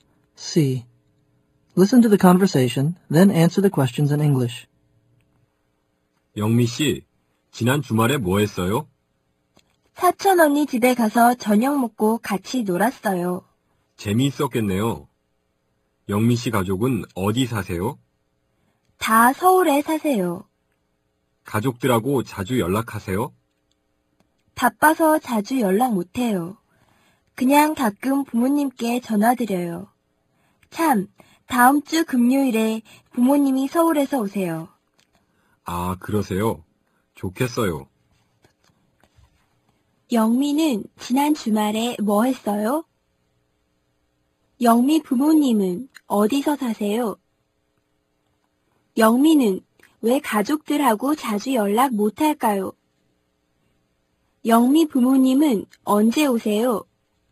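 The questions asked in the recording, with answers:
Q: 영미는 지난 주말에 뭐 했어요?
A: 사촌 언니 집에 가서 저녁 먹고 같이 놀았어요

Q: 영미 부모님은 어디서 사세요?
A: 서울

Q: 영미는 왜 가족들하고 자주 연락 못할까요?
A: 바빠서

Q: 영미 부모님은 언제 오세요?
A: 다음 주 금요일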